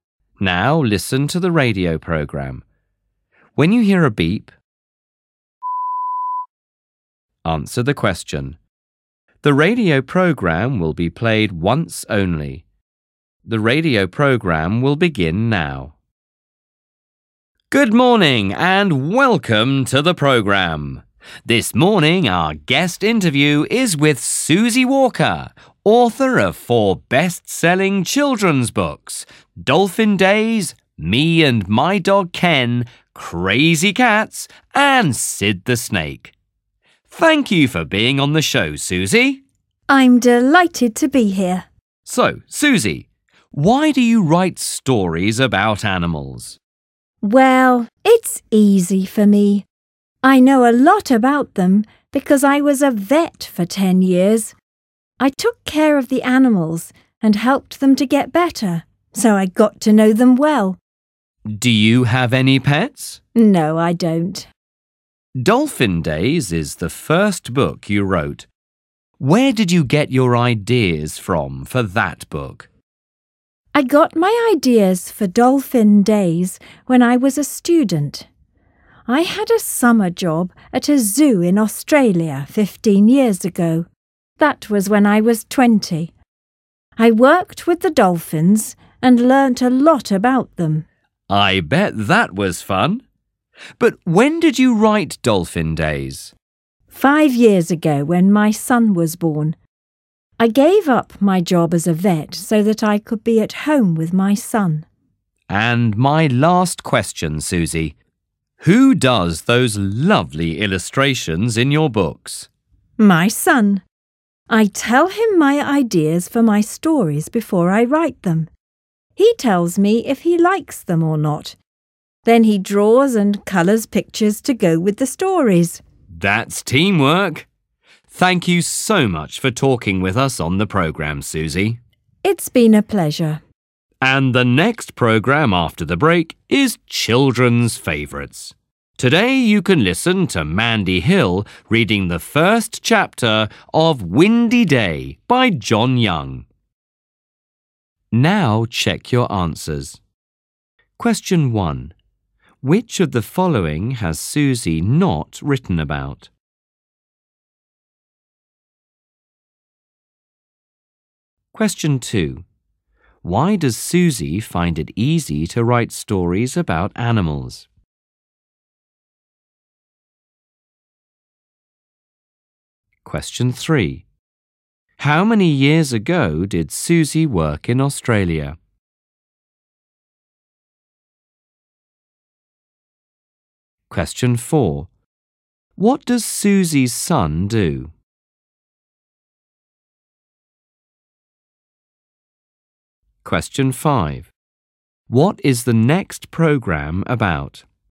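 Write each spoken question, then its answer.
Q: Why does Susie find it easy to write stories about animals?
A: She was a vet for 10 years, so she knows a lot about animals

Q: How many years ago did Susie work in Australia?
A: 15 years ago

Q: What does Susie's son do?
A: He draws and colours the illustrations for her books

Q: What is the next program about?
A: Children's Favourites: Mandy Hill reading the first chapter of Windy Day by John Young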